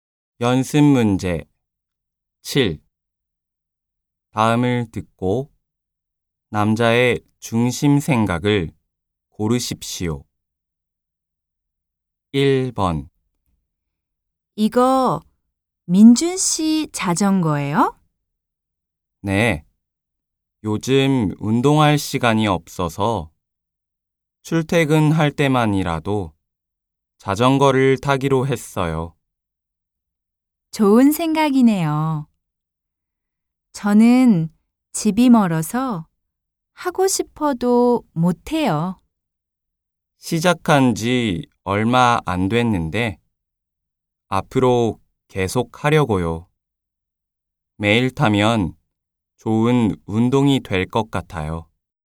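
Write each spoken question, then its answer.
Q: 다음을 듣고 남자의 중심 생각을 고르십시오.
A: 매일 자전거를 타면 좋은 운동이 될 것이다.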